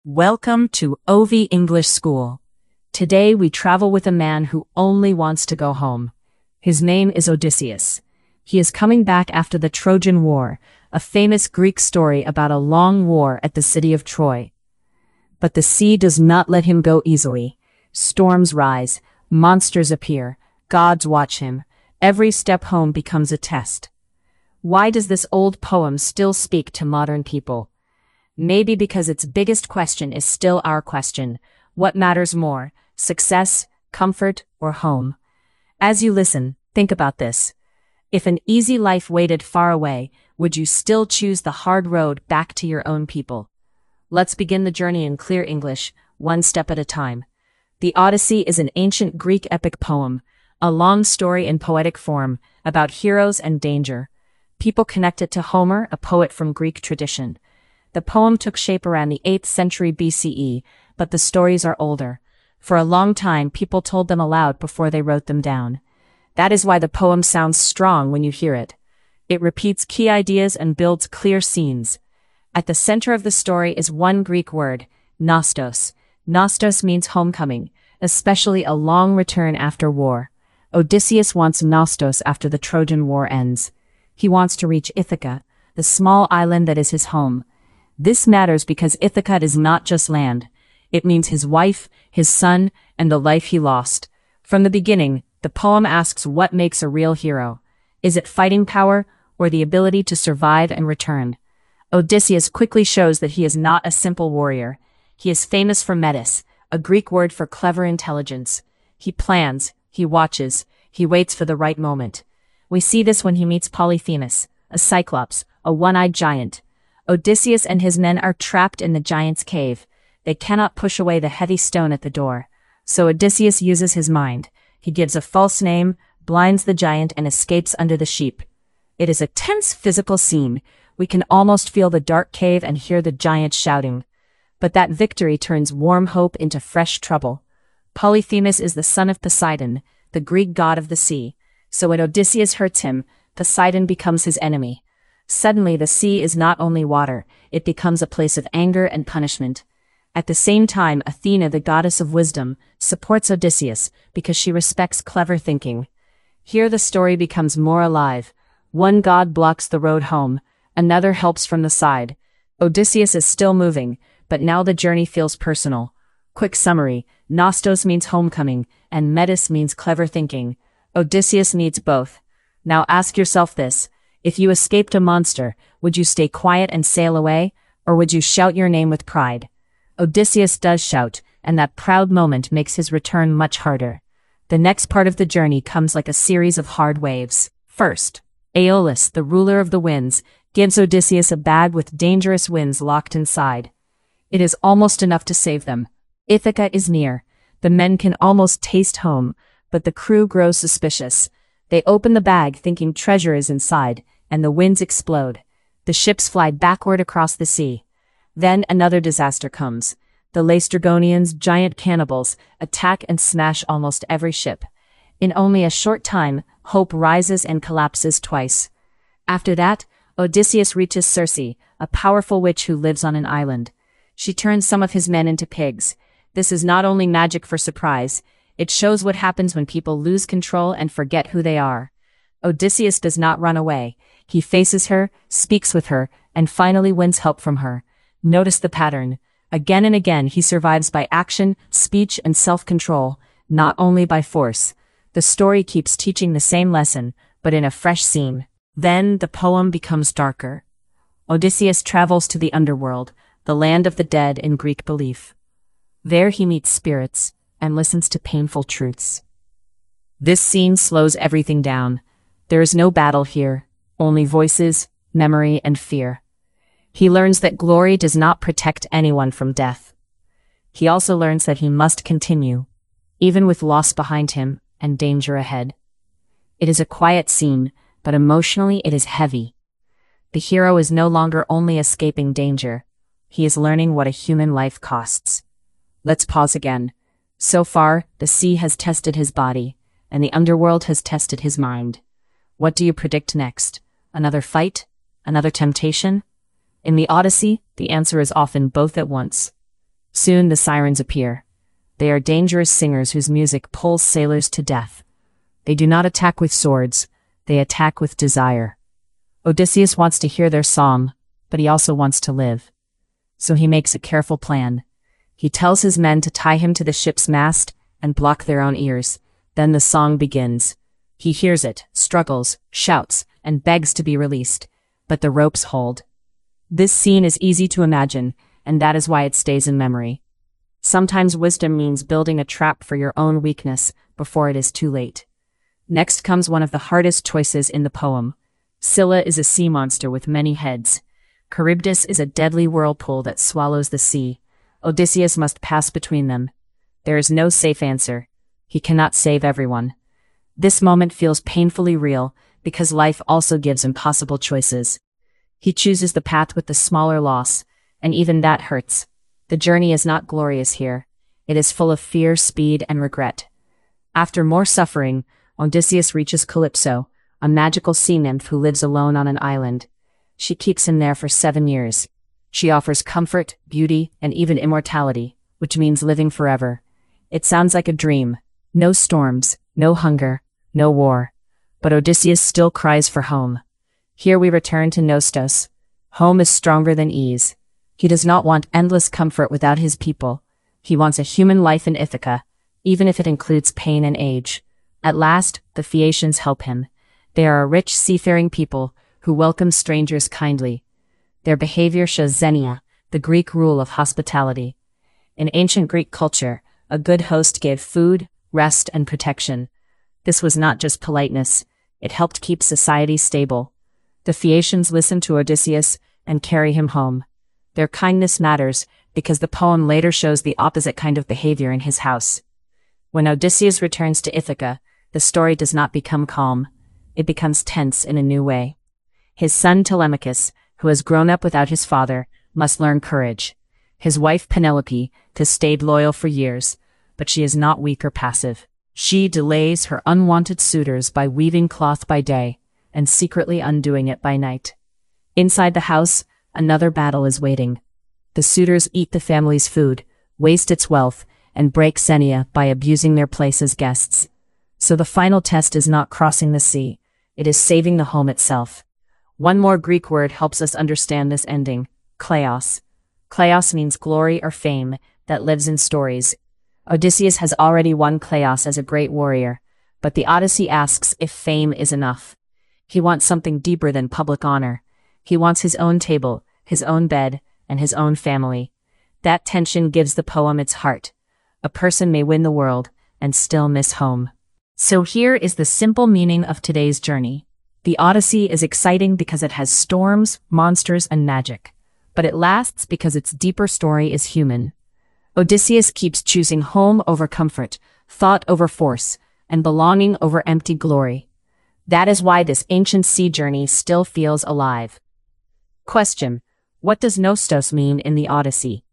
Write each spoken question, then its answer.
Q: what does Nestos mean in the Odyssey?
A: it means homecoming, especially a long return home after war.